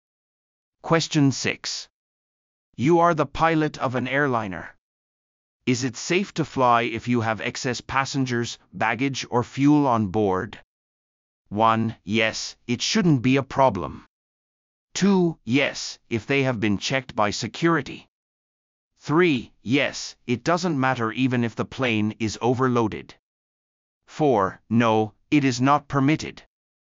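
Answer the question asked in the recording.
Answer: 4: No, it is not permitted.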